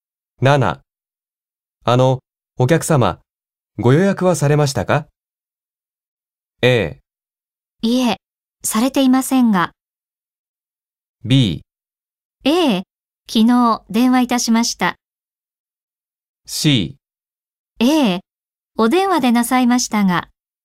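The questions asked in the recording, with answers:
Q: お客様、ご予約はされましたか?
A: B: 昨日電話いたしました。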